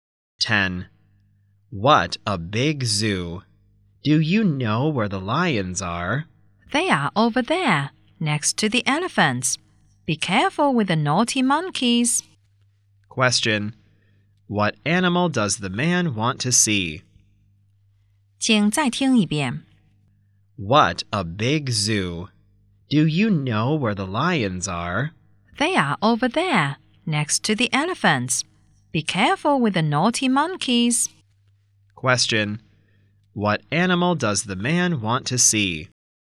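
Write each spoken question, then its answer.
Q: What animal does the man want to see?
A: Lions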